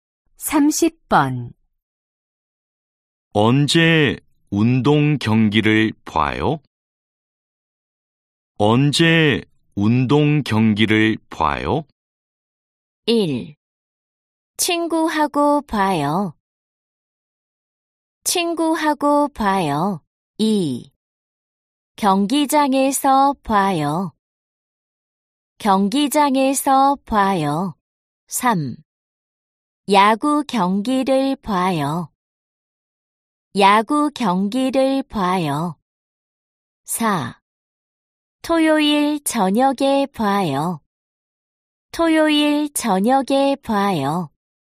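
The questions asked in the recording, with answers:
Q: 언제 운동 경기를 봐요?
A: 4: 토요일 저녁에 봐요.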